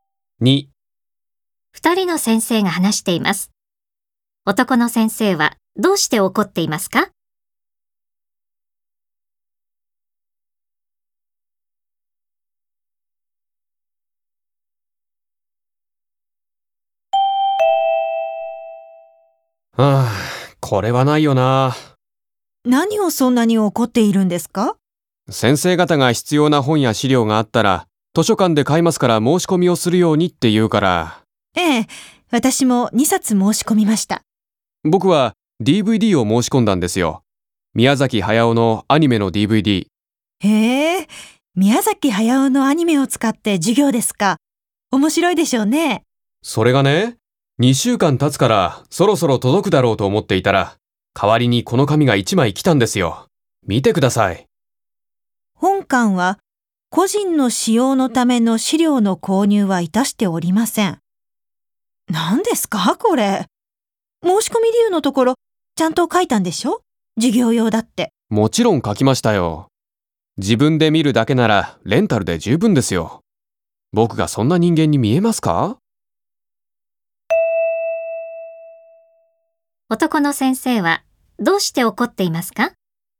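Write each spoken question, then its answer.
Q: 男の先生はどうして怒っていますか?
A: 授業用に申し込んだDVDを、図書館が個人の使用のためだと判断して買ってくれなかったから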